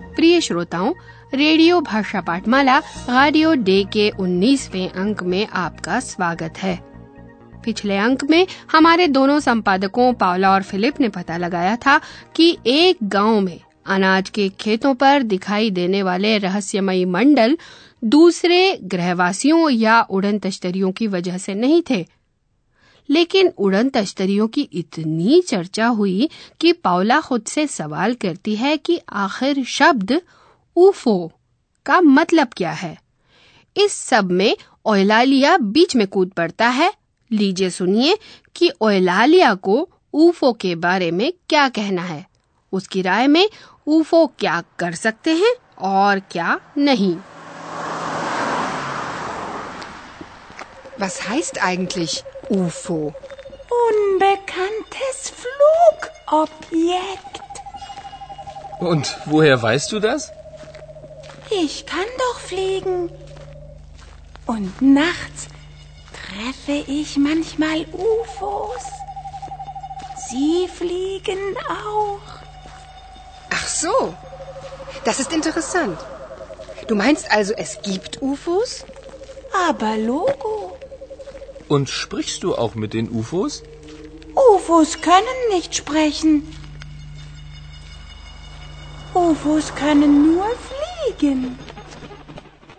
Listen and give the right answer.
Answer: Eulalia के लिए ये साफ है कि ऊफो एक काम नहीं कर सकते हैं और वह है बोलना sprechen.